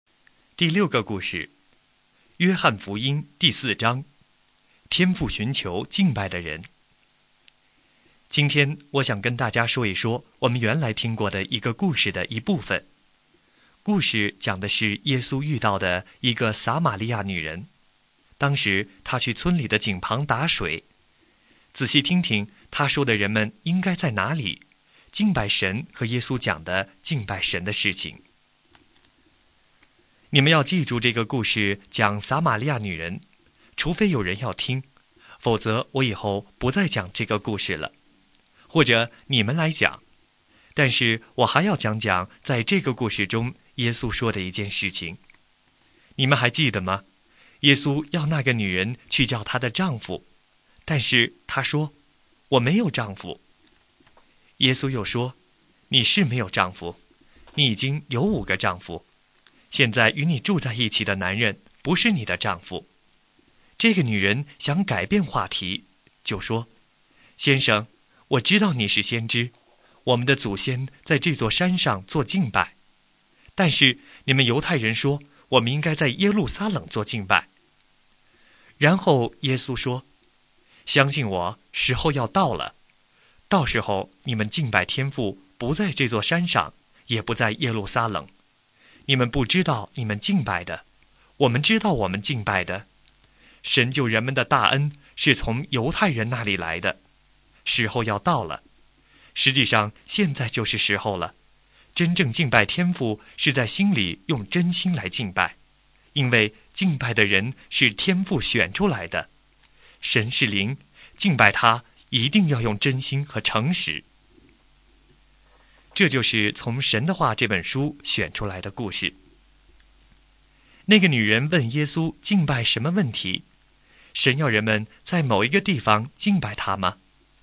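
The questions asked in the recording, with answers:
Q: 那个女人问耶稣敬拜什么问题?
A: 应该在哪里敬拜神:在这座山上还是在耶路撒冷

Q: 神要人们在某一个地方敬拜他吗?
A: 不是,不在这座山上,也不在耶路撒冷,而是要用真心和诚实敬拜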